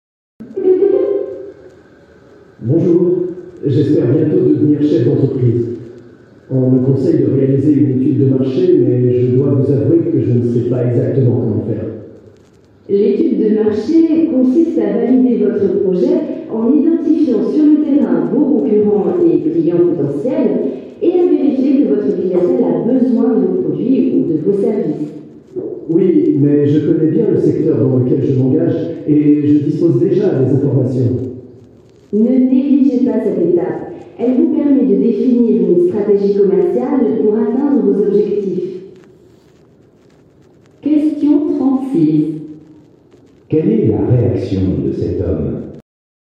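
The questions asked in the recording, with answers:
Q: Quelle est la réaction de cet homme ?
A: Il pense ne pas en avoir besoin car il connaît déjà bien son secteur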